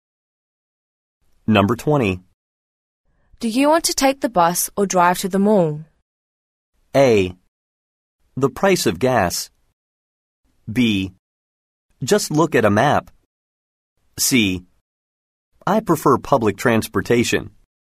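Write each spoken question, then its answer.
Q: Do you want to take the bus or drive to the mall?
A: C: I prefer public transportation.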